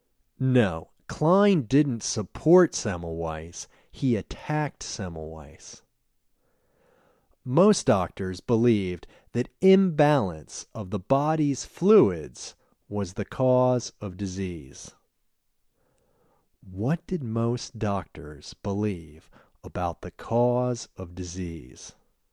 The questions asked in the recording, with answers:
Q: What did most doctors believe about the cause of disease?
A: Most doctors believed that imbalance of the body's fluids was the cause of disease.